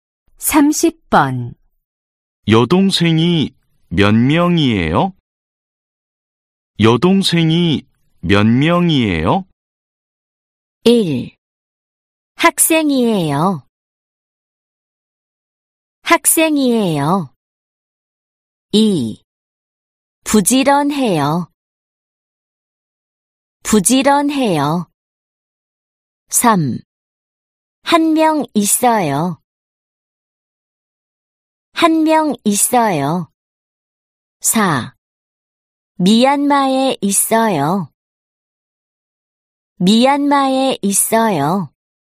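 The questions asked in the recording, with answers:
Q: 여동생이 몇 명이에요?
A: 3: 한 명 있어요.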